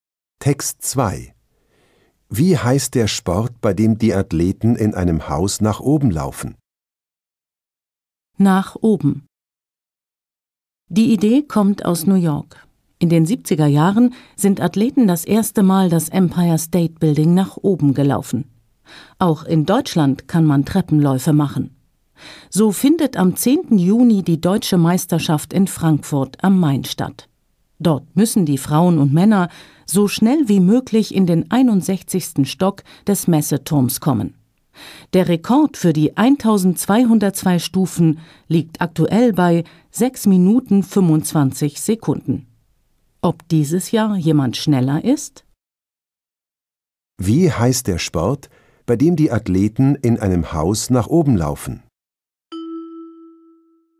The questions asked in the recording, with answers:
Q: Wie heißt der Sport, bei dem die Athleten in einem Haus nach oben laufen?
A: Der Sport heißt Treppenlauf.